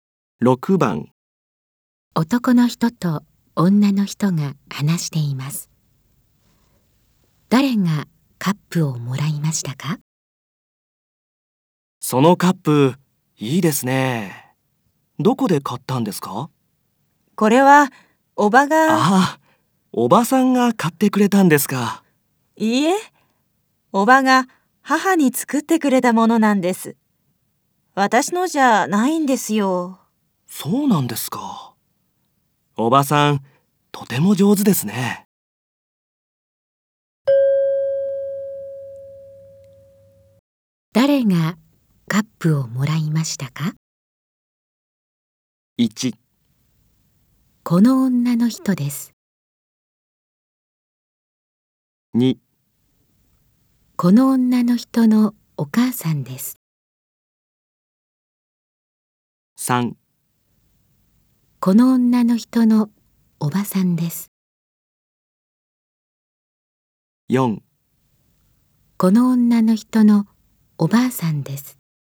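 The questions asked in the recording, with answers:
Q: 誰がカップをもらいましたか?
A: 2: この女の人のお母さんです。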